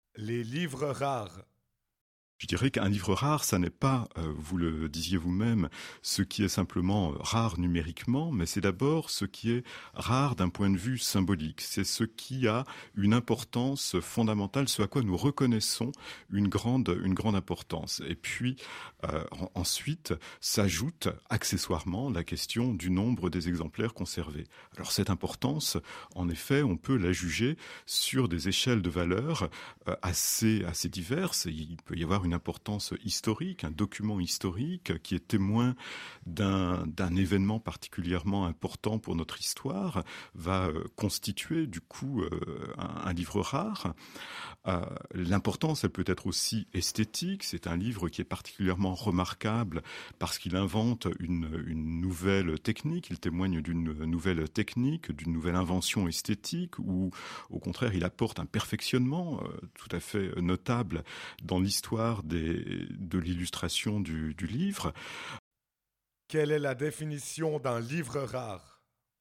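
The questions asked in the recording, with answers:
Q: Quelle est la définition d'un livre rare ?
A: Un livre d'abord rare d'un point de vue symbolique, c'est-à-dire d'une importance fondamentale (historique ou esthétique) ; le nombre d'exemplaires conservés ne compte qu'accessoirement.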